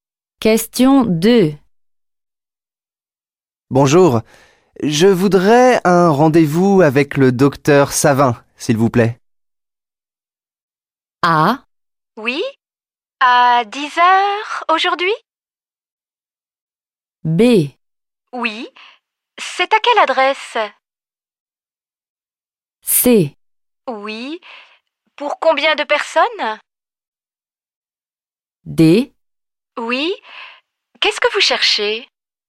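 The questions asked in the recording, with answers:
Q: Bonjour, je voudrais un rendez-vous avec le docteur Savin, s'il vous plaît.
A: A: Oui, à 10h aujourd'hui.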